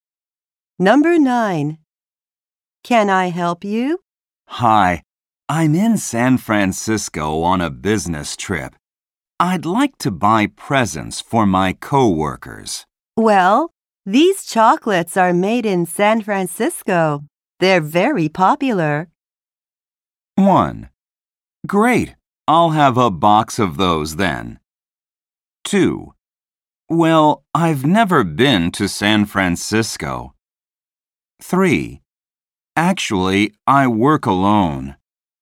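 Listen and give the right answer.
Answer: 1: Great, I'll have a box of those then.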